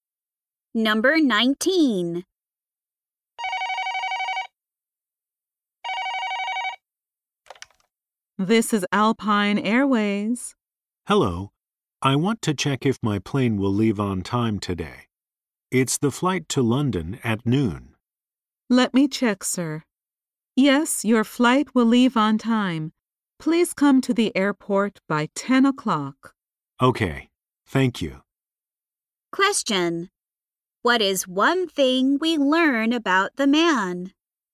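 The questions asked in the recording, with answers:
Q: what is one thing we learn about the man?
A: He is flying to London at noon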